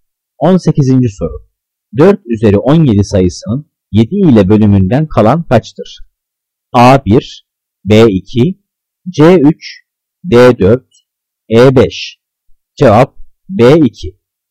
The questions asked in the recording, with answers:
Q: 18. soru. 4 üzeri 17 sayısının 7 ile bölümünden kalan kaçtır?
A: Cevap B 2.